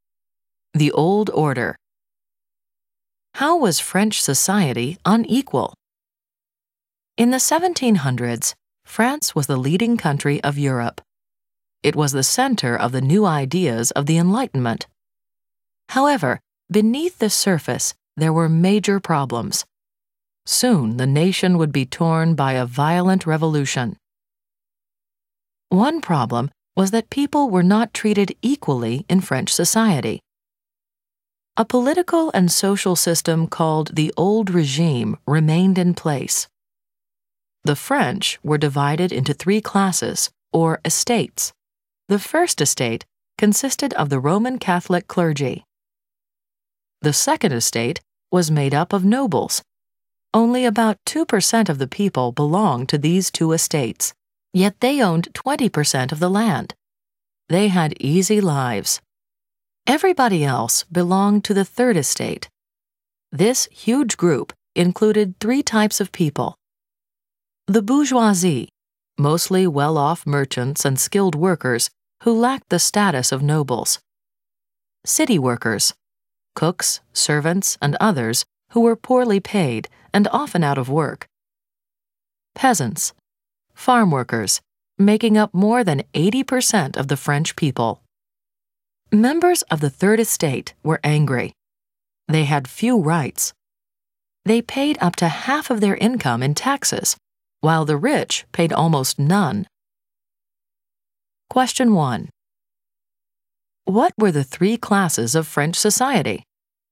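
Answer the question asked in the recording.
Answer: The first estate (Roman Catholic clergy), the second estate (nobles), and the third estate (everyone else)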